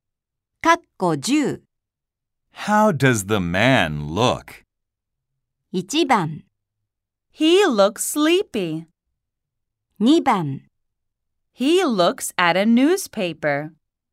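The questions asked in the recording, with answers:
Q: How does the man look?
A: 1: He looks sleepy.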